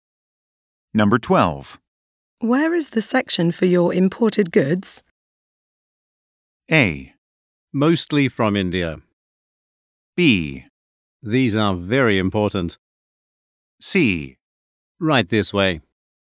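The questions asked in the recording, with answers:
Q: Where is the section for your imported goods?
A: C: Right this way.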